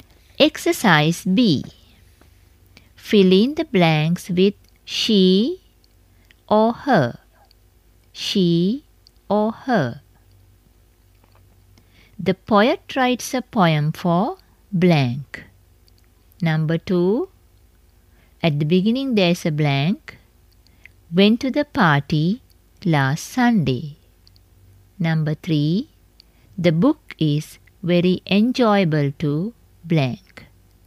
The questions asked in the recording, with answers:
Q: The poet writes a poem for blank.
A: The poet writes a poem for her.

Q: The book is very enjoyable to blank.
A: The book is very enjoyable to her.